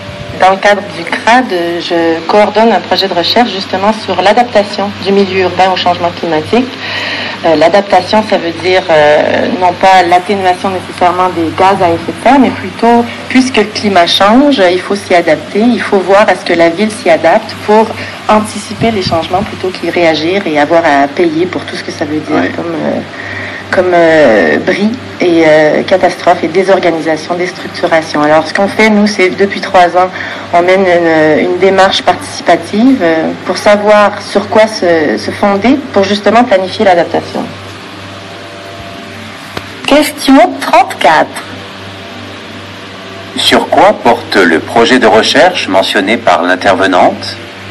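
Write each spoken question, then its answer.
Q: Sur quoi porte le projet de recherche mentionné par l'intervenante?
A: Sur l'adaptation du milieu urbain au changement climatique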